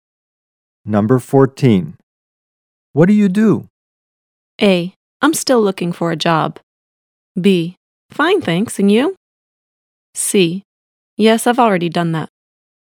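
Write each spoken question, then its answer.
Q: What do you do?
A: A: I'm still looking for a job.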